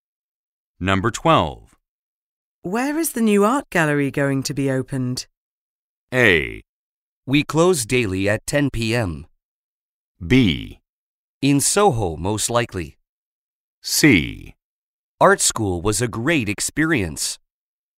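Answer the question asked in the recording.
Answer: B: In Soho, most likely.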